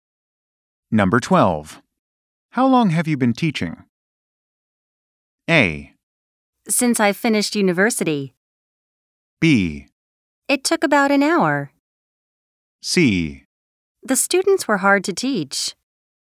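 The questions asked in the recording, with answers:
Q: How long have you been teaching?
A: A: Since I finished university.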